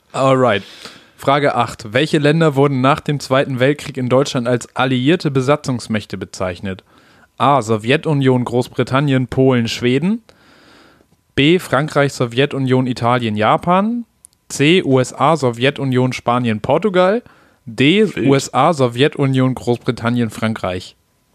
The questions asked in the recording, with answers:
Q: Welche Länder wurden nach dem Zweiten Weltkrieg in Deutschland als alliierte Besatzungsmächte bezeichnet?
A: D. D, ne?